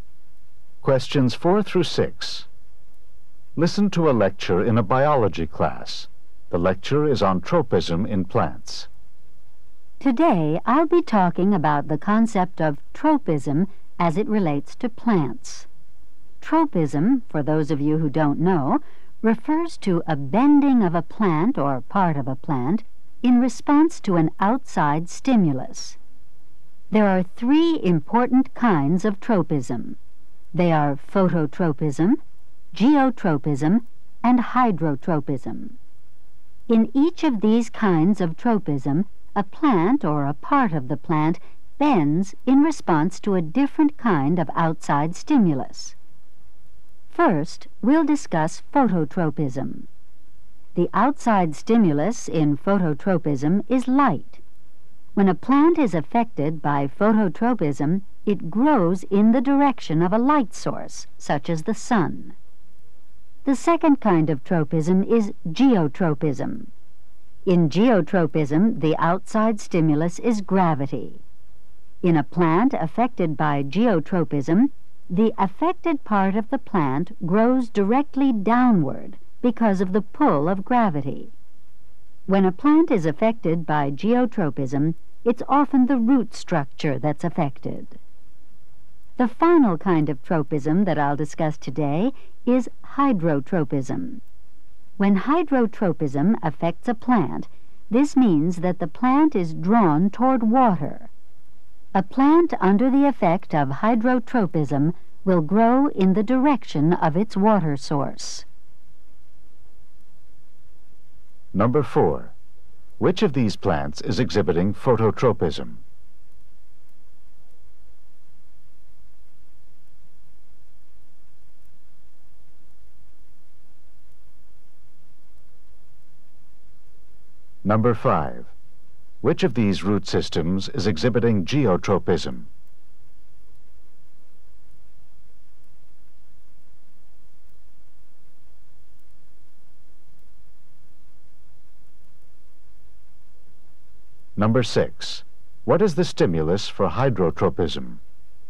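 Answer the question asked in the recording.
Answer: Water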